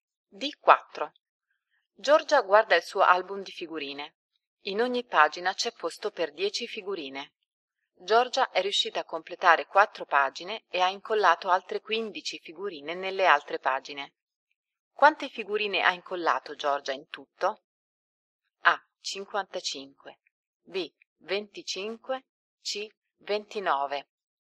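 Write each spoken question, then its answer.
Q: Quante figurine ha incollato Giorgia in tutto?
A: A: 55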